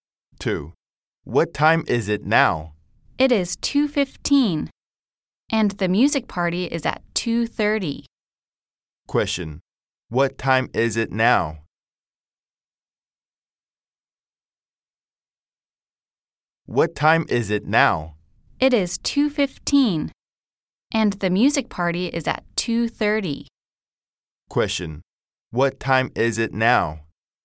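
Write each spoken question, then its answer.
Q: Question, what time is it now?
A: 2:15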